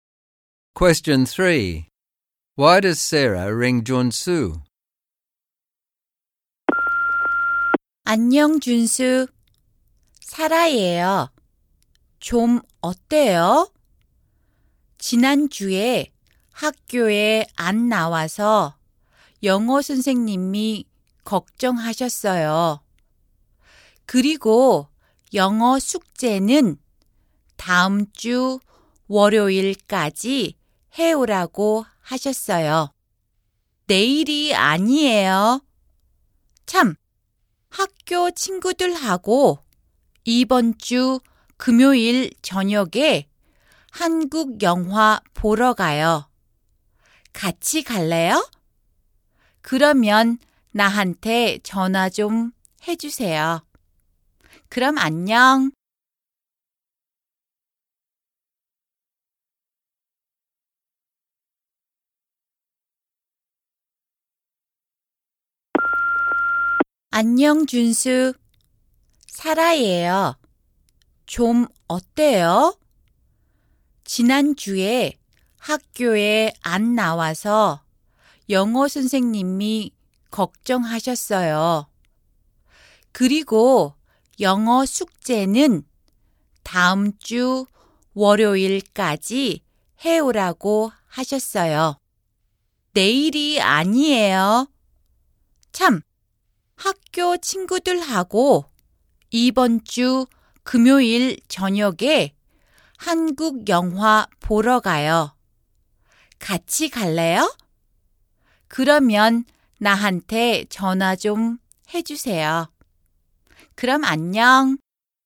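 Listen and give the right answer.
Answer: To tell him the English homework is due next Monday, not tomorrow, and to invite him to a Korean movie with school friends on Friday evening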